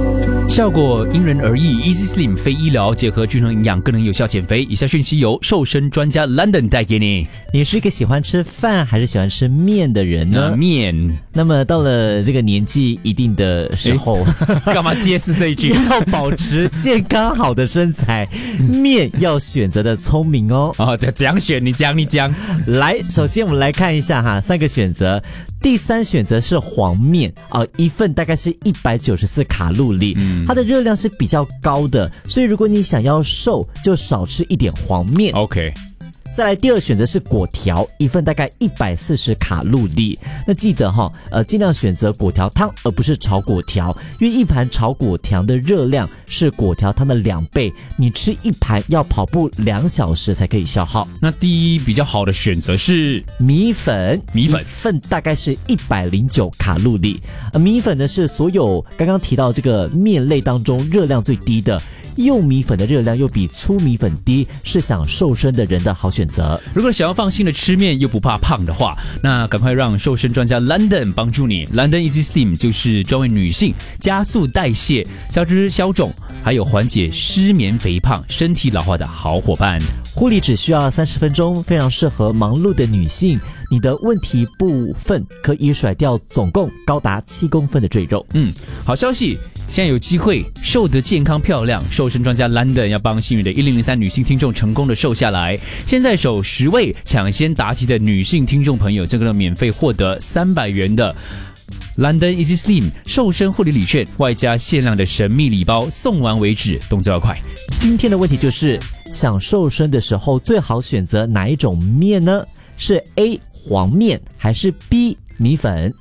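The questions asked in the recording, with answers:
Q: 今天的问题就是,想瘦身的时候最好选择哪一种面呢?是 A 黄面还是 B 米粉?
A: B: 米粉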